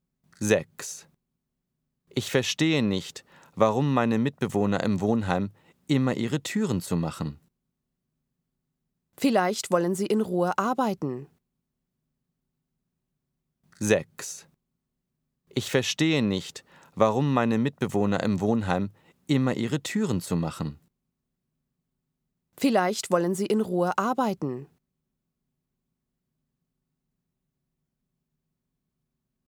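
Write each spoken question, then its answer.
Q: Ich verstehe nicht, warum meine Mitbewohner im Wohnheim immer ihre Türen zumachen. Vielleicht wollen sie in Ruhe arbeiten.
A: L: logisch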